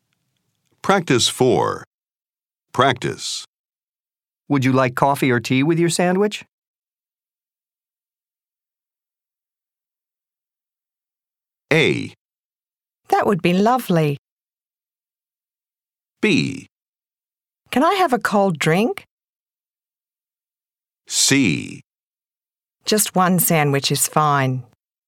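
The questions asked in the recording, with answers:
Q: Would you like coffee or tea with your sandwich?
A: B: Can I have a cold drink?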